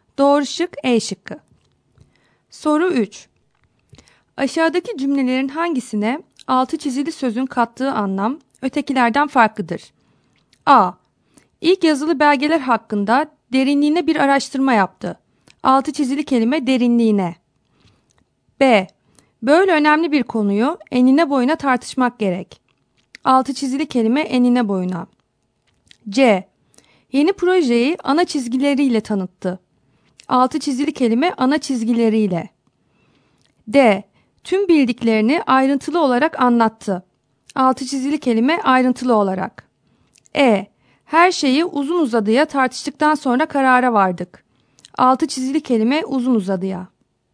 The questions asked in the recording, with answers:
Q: Aşağıdaki cümlelerin hangisine altı çizili sözün kattığı anlam ötekilerden farklıdır?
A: Doğru cevap C şıkkı.